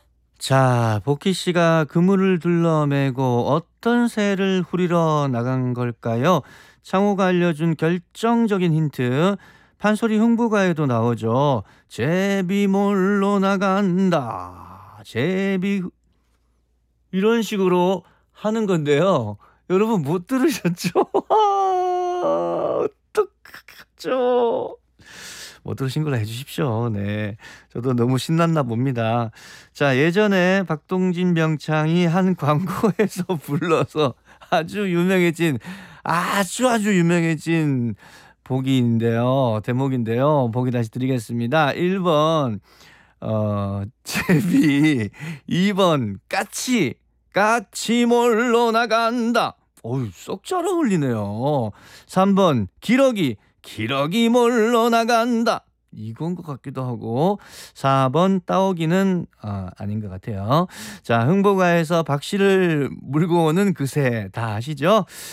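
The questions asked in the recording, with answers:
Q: 자, 복희 씨가 그물을 둘러매고 어떤 새를 후리러 나간 걸까요?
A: 1번: 제비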